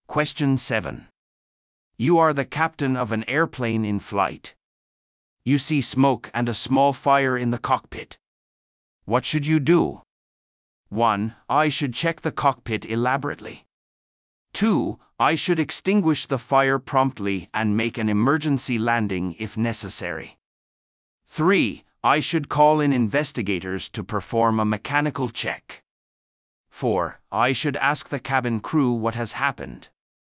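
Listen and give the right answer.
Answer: 2: I should extinguish the fire promptly and make an emergency landing if necessary.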